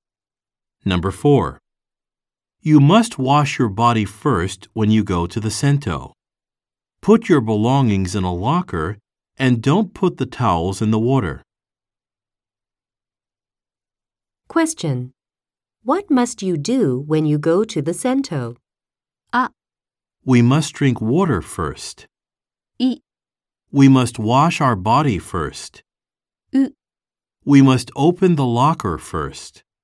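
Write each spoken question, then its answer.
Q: What must you do when you go to the sento?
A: I: We must wash our body first.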